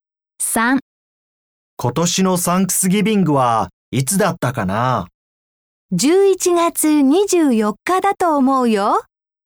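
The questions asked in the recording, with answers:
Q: 今年のサンクスギビングはいつだったかな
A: 11月24日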